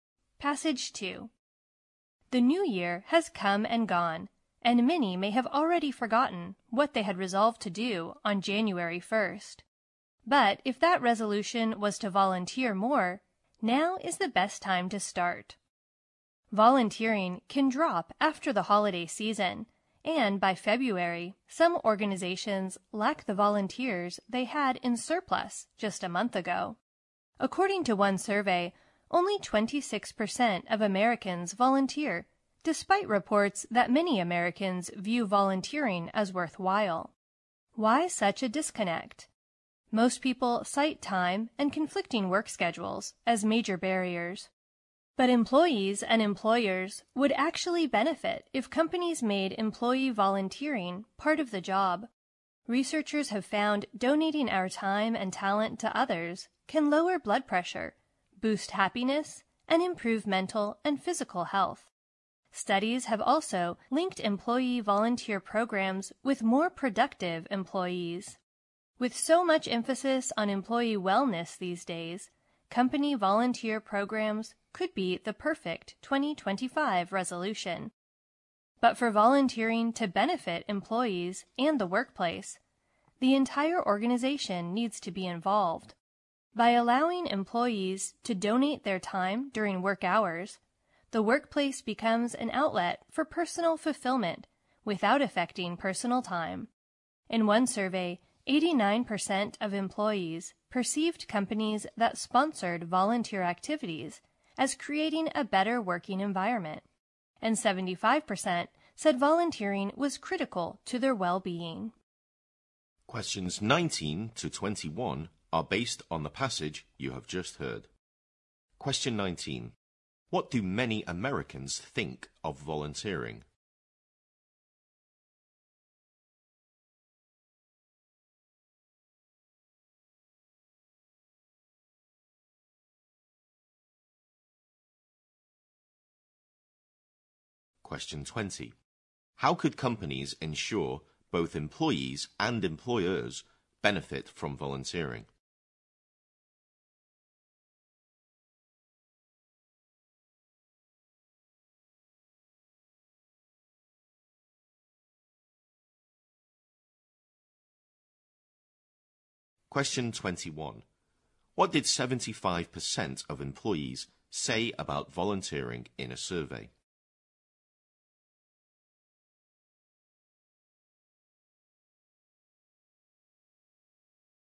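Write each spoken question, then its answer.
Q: What do many Americans think of volunteering?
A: It is worthwhile

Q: How could companies ensure both employees and employers benefit from volunteering?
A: By making volunteering part of the job, allowing it during work hours

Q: What did 75% of employees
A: Volunteering was critical to their well-being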